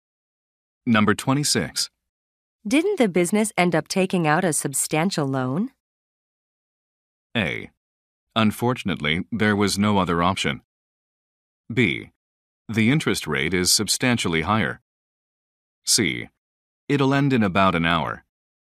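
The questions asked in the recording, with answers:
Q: Didn't the business end up taking out a substantial loan?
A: A: Unfortunately, there was no other option.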